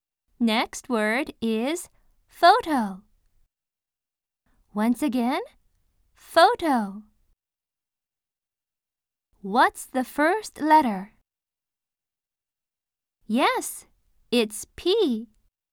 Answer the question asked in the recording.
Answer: Yes, it's P.